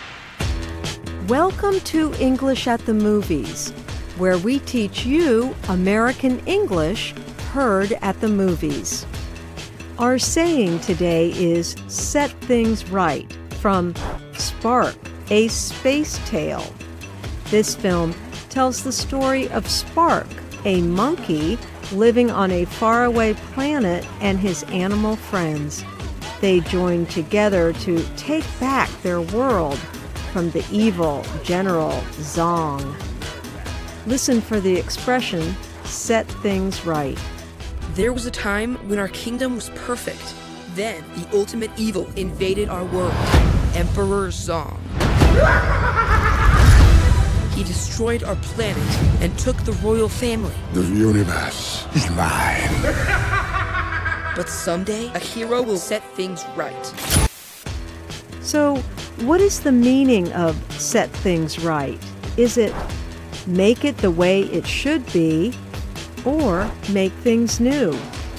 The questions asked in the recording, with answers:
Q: So, what is the meaning of set things right?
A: Set things right means to make things the way they should be.